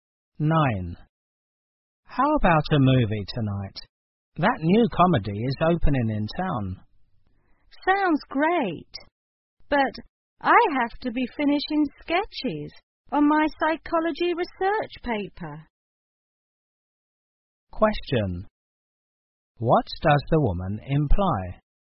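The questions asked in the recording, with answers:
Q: What does the woman imply?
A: She can't go because she must work on her psychology paper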